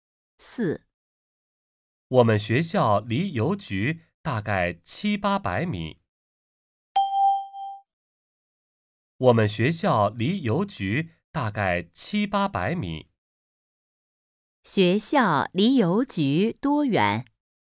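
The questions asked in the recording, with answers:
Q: 学校离邮局多远?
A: 大概700-800米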